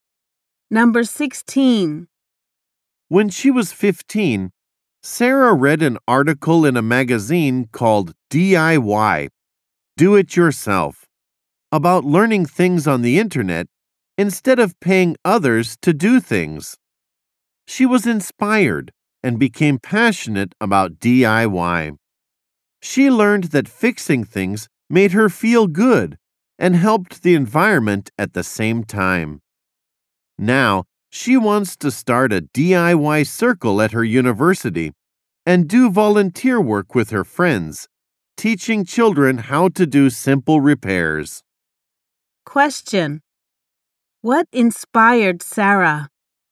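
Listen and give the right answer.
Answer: A magazine article about DIY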